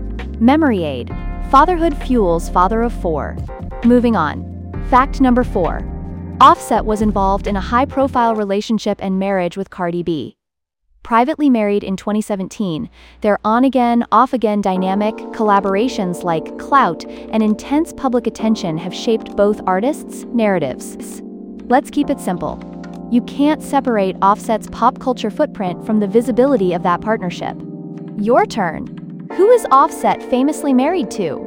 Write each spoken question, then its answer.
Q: Who is Offset famously married to?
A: Correct answer, Cardi B.